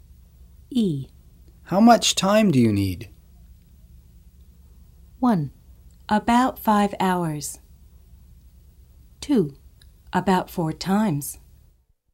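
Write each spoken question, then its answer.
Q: How much time do you need?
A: 1: About 5 hours.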